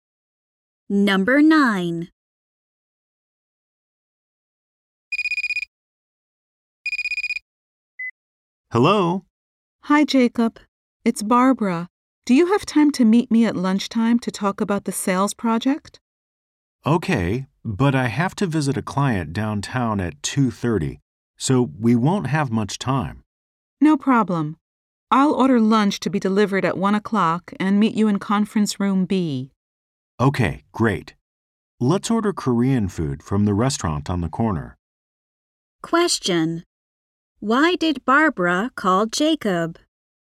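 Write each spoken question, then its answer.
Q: Why did Barbara call Jacob?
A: To arrange a lunchtime meeting about the sales project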